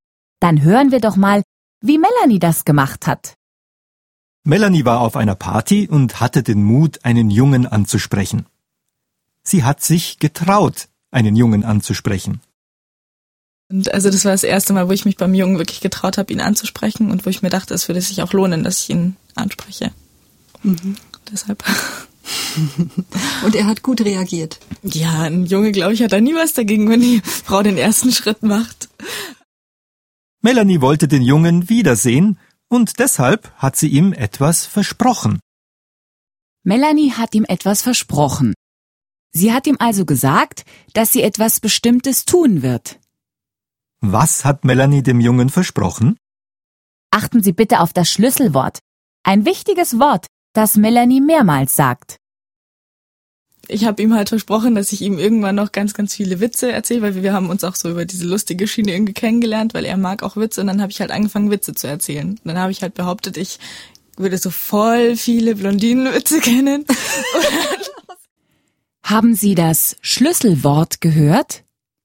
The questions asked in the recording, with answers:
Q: Was hat Melanie dem Jungen versprochen?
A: Melanie hat dem Jungen versprochen, ihm ganz viele Blondinenwitze zu erzählen.